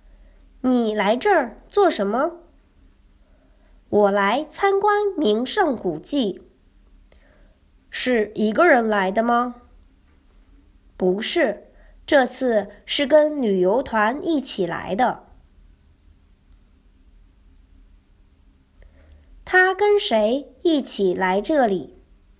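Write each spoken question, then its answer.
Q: 他跟谁一起来这里?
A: 跟旅游团一起来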